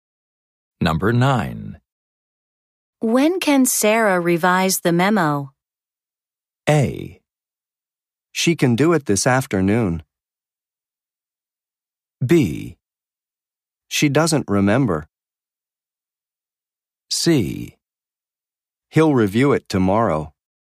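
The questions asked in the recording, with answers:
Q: When can Sarah revise the memo?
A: A: She can do it this afternoon.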